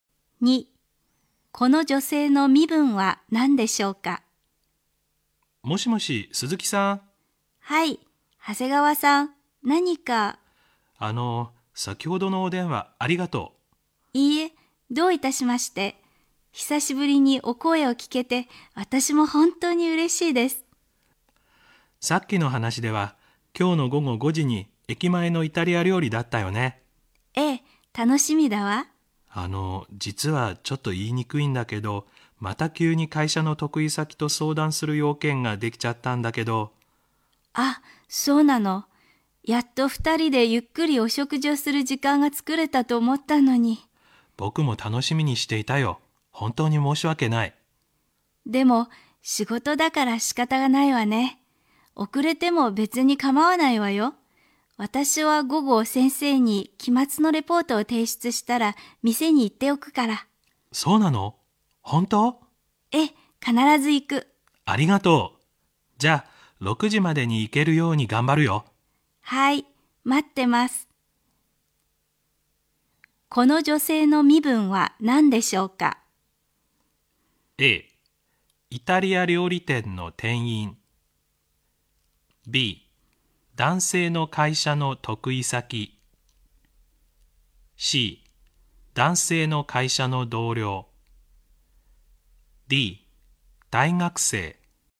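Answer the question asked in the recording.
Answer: D: 大学生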